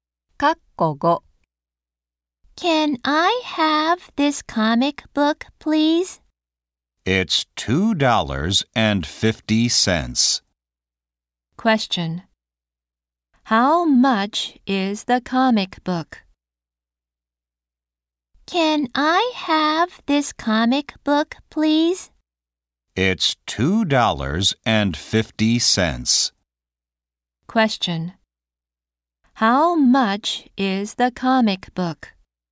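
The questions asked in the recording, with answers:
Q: How much is the comic book?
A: $2.50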